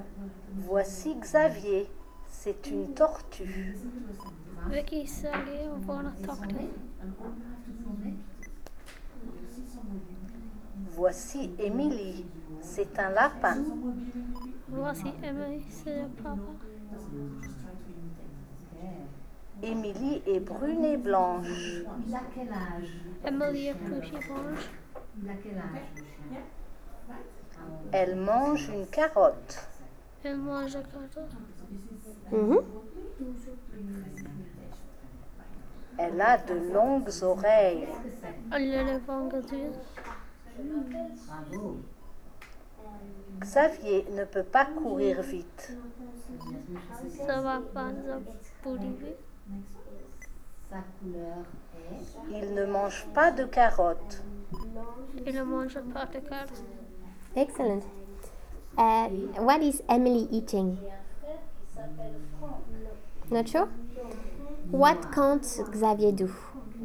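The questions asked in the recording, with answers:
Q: What is Emily eating?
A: A carrot

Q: What can't Xavier do?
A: Run fast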